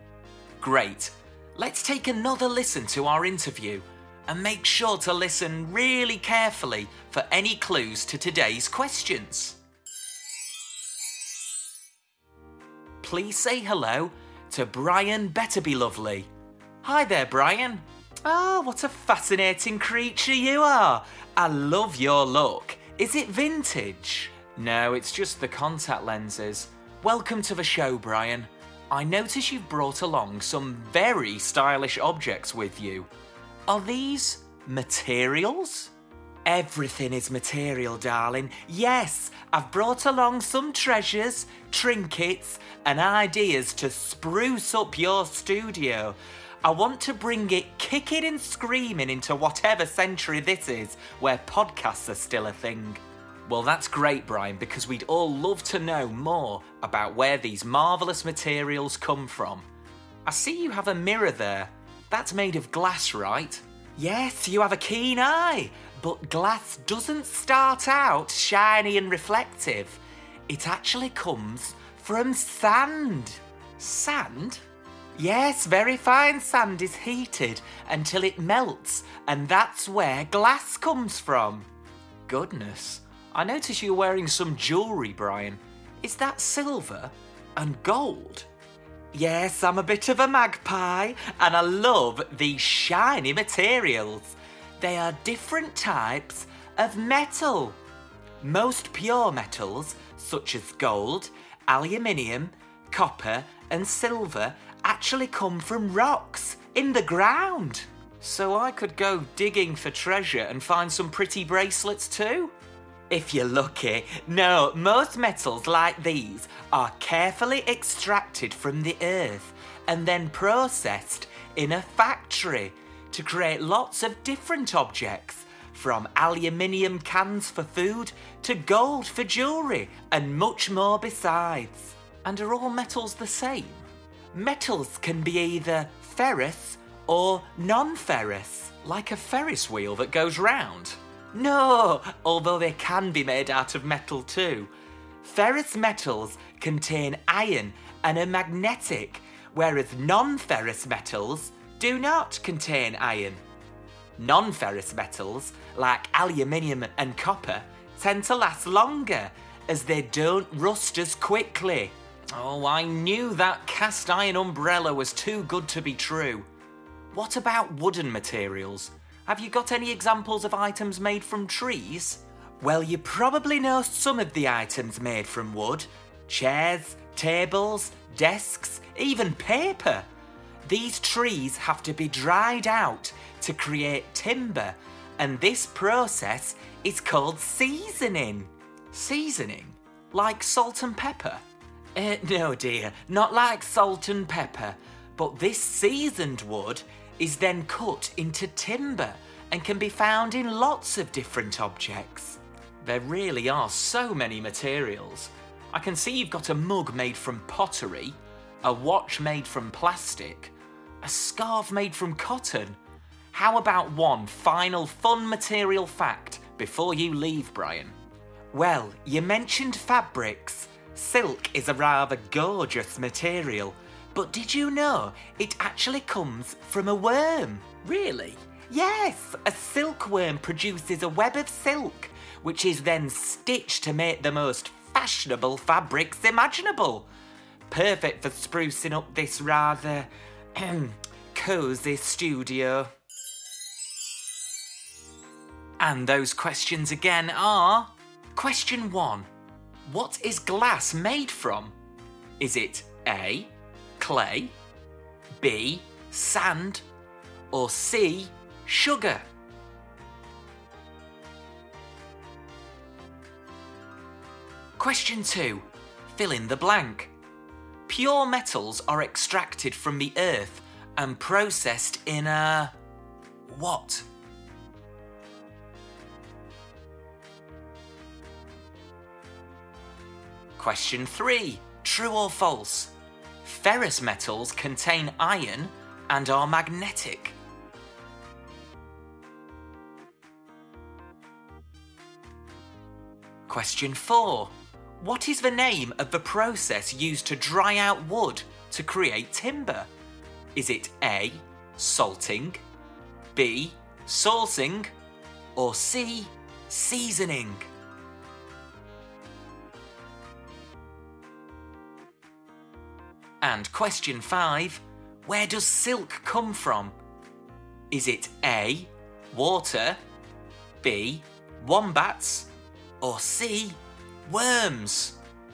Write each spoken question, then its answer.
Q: What is glass made from?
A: The answer is B. It's made from sand.

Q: Pure metals are extracted from the earth and processed in a...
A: Pure metals are extracted from the earth and processed in a factory.

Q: Ferrous metals contain iron and are magnetic.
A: The answer is... true.

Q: What is the name of the process used to dry out wood to create timber?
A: The answer is C, seasoning.

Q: Where does silk come from?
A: The answer is C, worms.